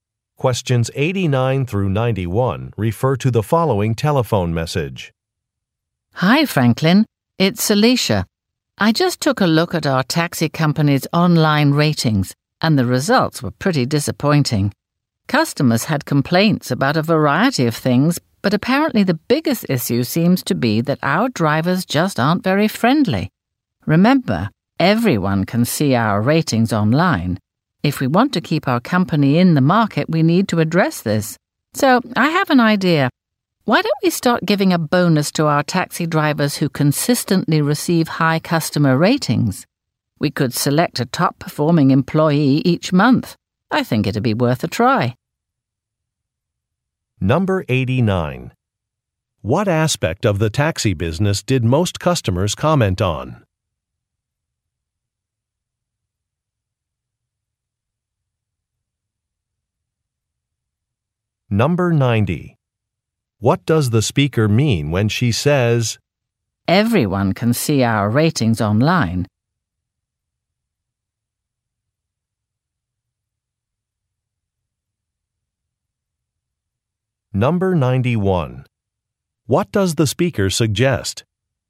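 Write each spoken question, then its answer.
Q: What aspect of the taxi business did most customers comment on?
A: Drivers' unfriendliness

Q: What does the speaker mean when she says,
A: The bad ratings could hurt the business

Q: What does the speaker suggest?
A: Giving bonuses to highly rated drivers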